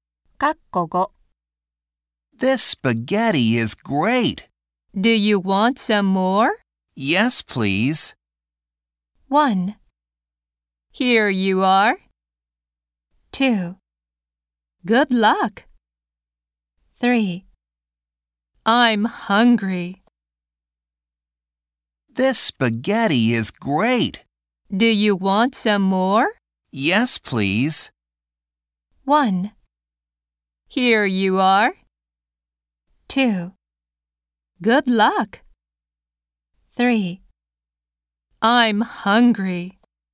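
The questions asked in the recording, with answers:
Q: Yes, please.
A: 1: Here you are.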